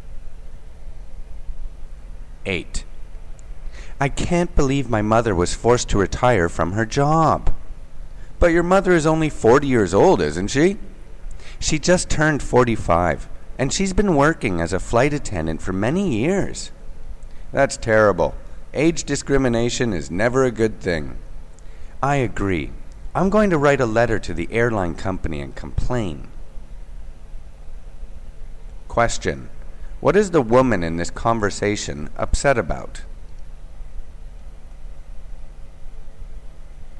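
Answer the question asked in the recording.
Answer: Her mother was forced to retire from her job as a flight attendant (age discrimination)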